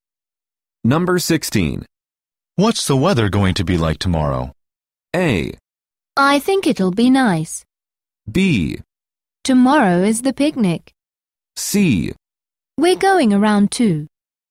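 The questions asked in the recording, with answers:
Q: What's the weather going to be like tomorrow?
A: A: I think it'll be nice.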